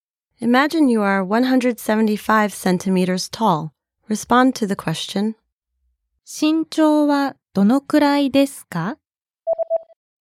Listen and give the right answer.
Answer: 175センチです。